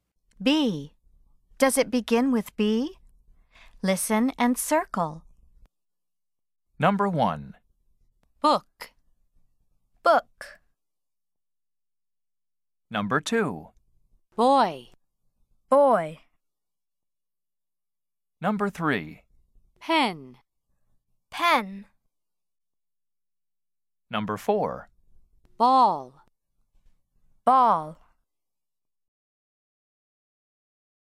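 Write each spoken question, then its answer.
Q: Does it begin with B?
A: Yes (book)

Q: Does it begin with B?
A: Yes (boy)

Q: Does it begin with B?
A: No (pen)

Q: Does it begin with B?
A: Yes (ball)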